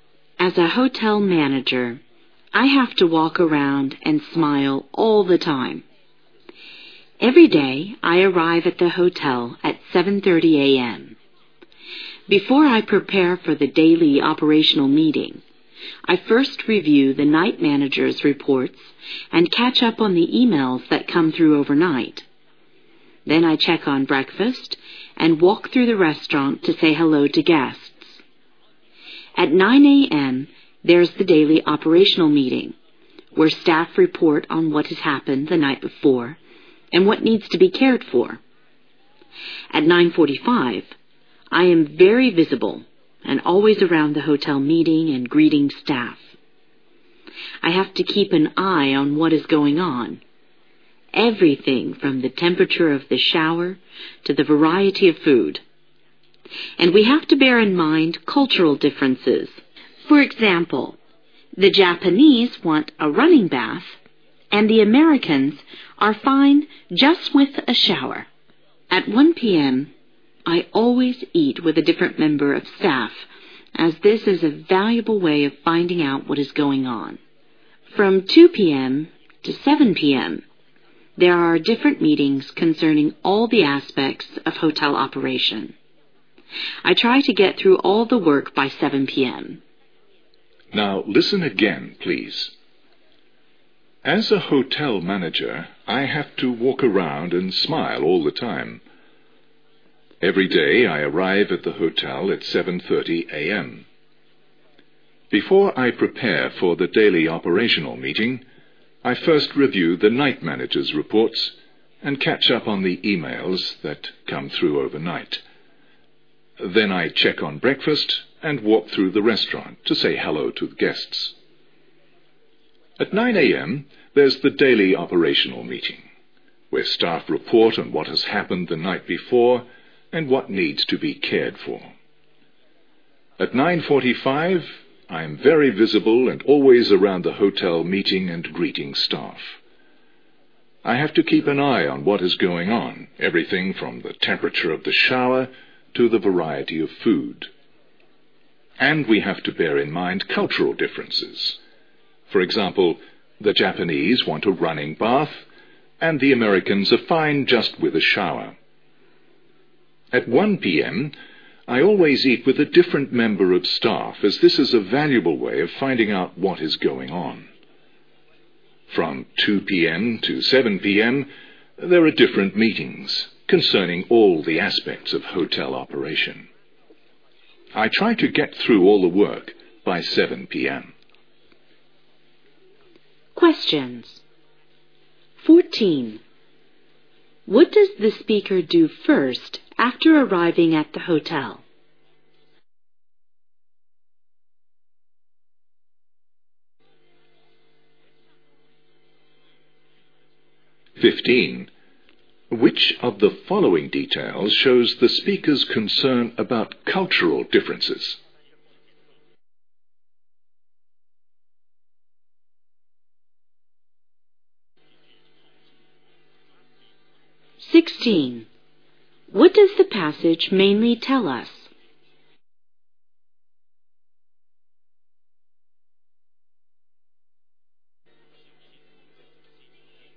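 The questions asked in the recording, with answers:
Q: What does the speaker do first after arriving at the hotel?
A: Reviews the night manager's reports

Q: Which of the following details shows the speaker's concern about cultural differences?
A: The Japanese want a running bath, while Americans are fine with a shower

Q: What does the passage mainly tell us?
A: A hotel manager's daily routine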